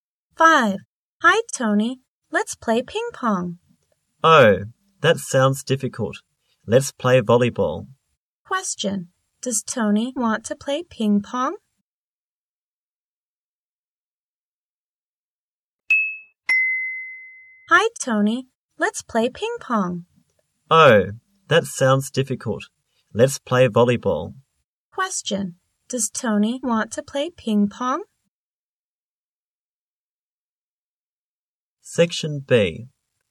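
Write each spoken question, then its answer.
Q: Does Tony want to play ping pong?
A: No, he doesn't.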